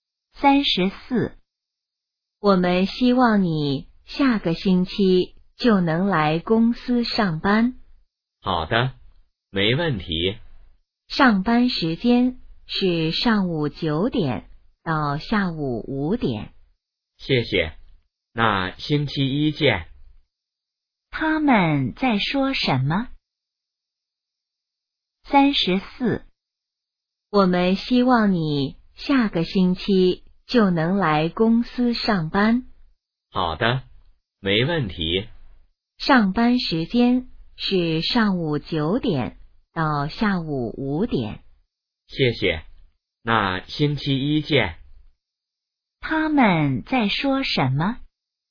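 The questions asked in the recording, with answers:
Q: 他们在说什么?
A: 去公司上班的事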